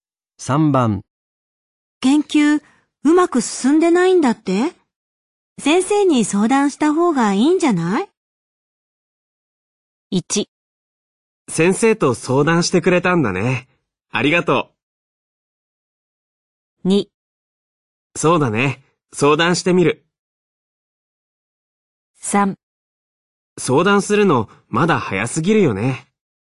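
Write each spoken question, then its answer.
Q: 研究うまく進んでないんだって先生に相談した方がいいんじゃない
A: 2: そうだね。相談してみる。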